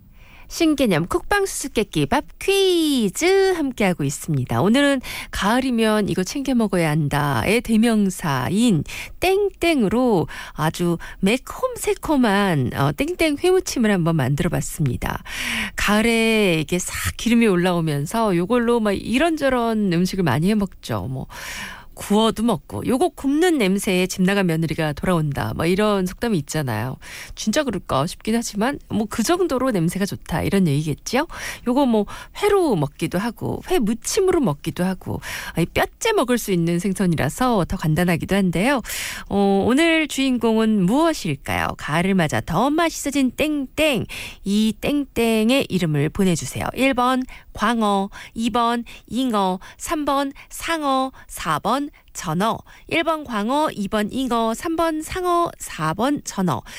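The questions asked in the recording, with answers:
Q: 오늘 주인공은 무엇일까요? 가을을 맞아 더 맛있어진 땡땡.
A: 4: 전어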